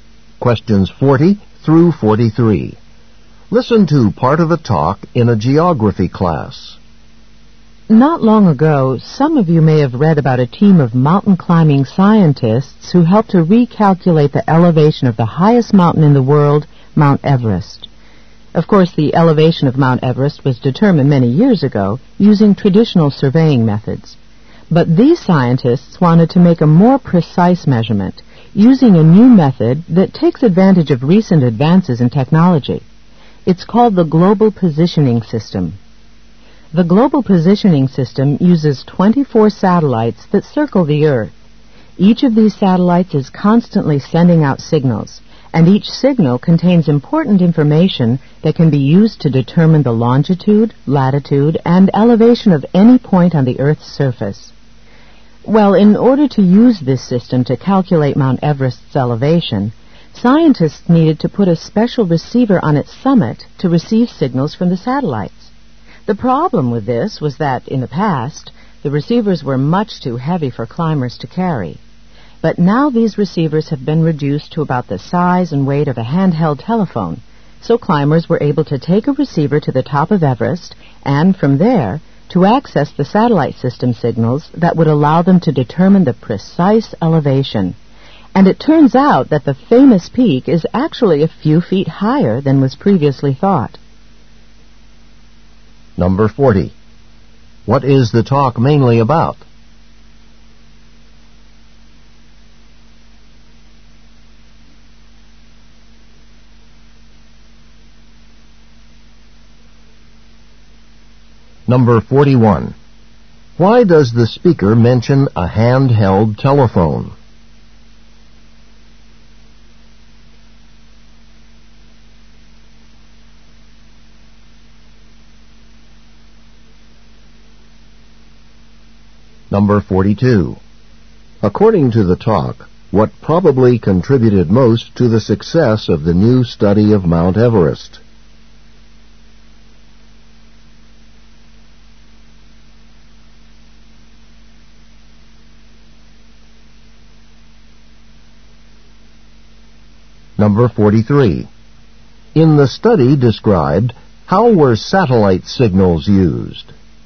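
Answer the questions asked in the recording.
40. Measuring Mount Everest's elevation again with the Global Positioning System.
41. To show how small and light the receivers now are.
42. Smaller, lighter receivers that climbers could carry.
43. To find the precise elevation of the summit.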